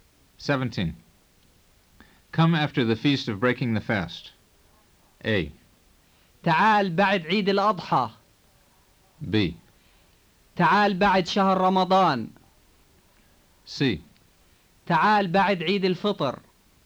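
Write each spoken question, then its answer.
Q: Come after the feast of breaking the fast.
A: C: تعال بعد عيد الفطر.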